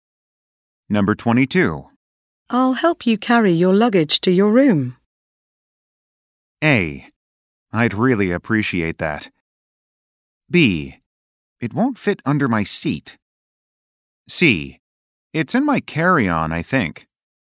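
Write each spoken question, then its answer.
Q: I'll help you carry your luggage to your room.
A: A: I'd really appreciate that.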